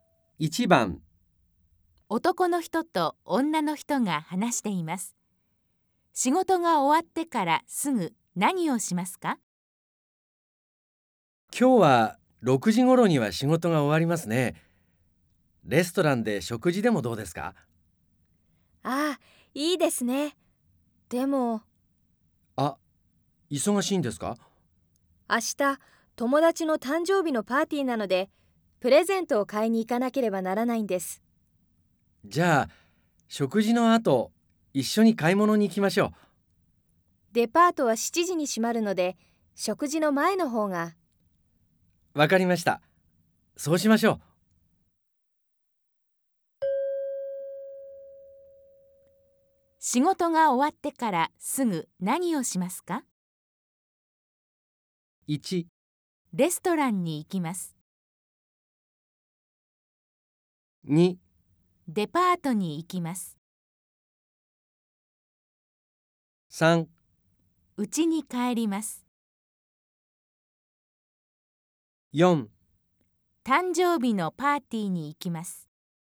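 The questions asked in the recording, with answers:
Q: 仕事が終わってからすぐ何をしますか?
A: 2: デパートに行きます。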